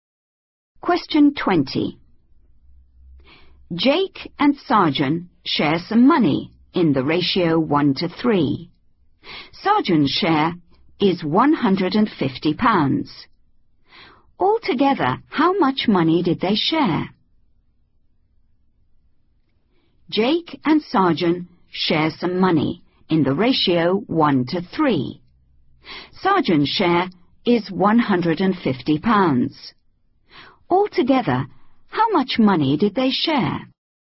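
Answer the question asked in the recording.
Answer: £200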